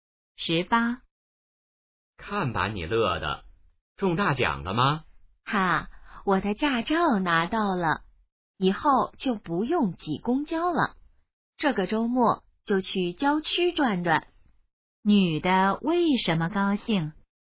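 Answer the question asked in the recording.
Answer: 拿到驾照了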